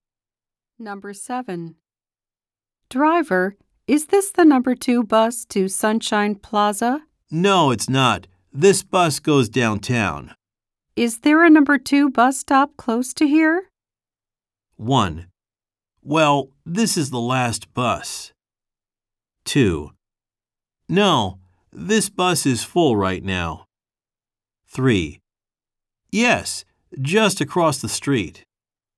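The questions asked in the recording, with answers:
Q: Is there a number 2 bus stop close to here?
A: 3: Yes, just across the street.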